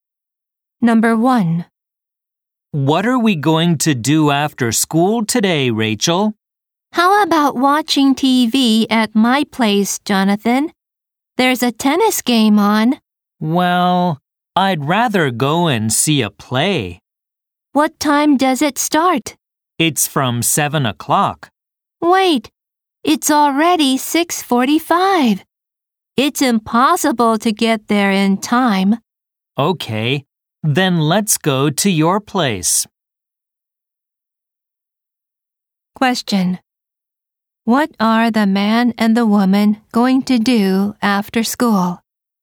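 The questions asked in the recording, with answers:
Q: What are the man and the woman going to do after school?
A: Watch a tennis game on TV at Rachel's place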